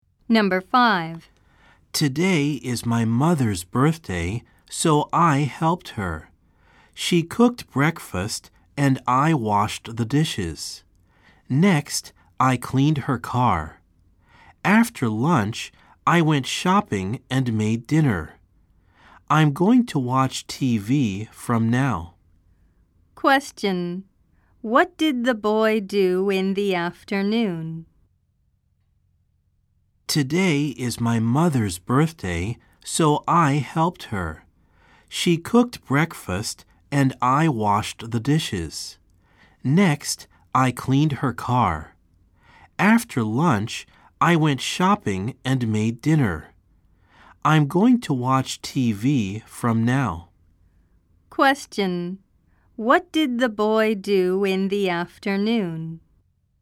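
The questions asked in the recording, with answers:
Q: What did the boy do in the afternoon?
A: He went shopping and made dinner.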